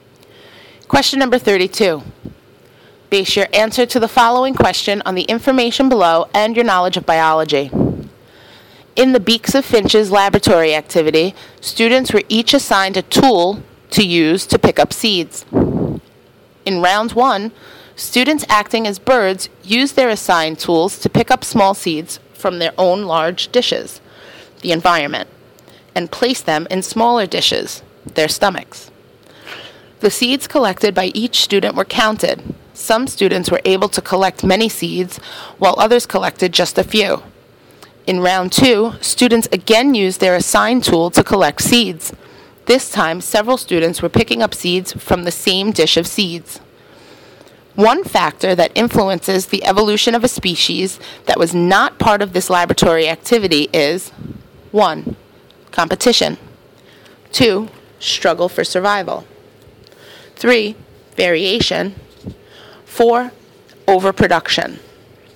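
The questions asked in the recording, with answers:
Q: One factor that influences the evolution of a species that was not part of this laboratory activity is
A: 4: Overproduction.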